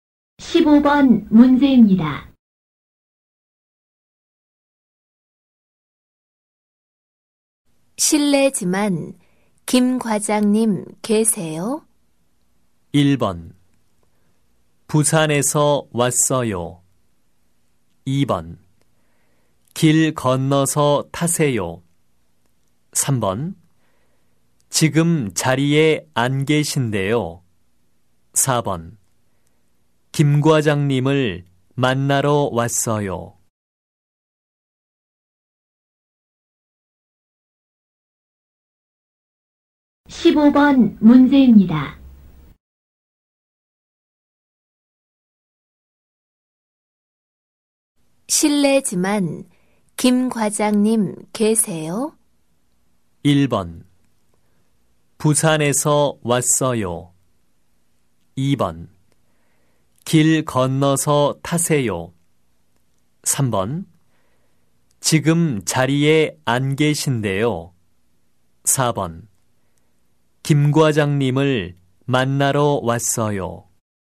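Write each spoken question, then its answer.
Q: 실례지만 김 과장님 계세요?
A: 3: 지금 자리에 안 계신데요.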